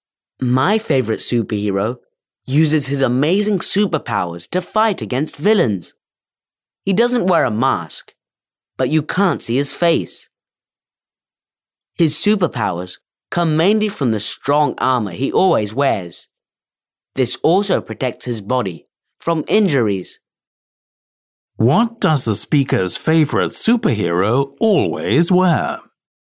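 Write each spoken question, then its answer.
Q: What does the speaker's favorite superhero always wear?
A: Strong armor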